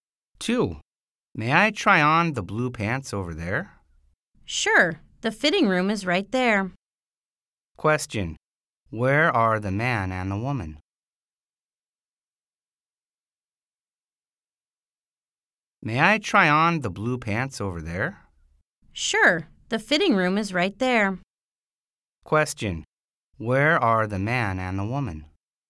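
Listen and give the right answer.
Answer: In a clothes store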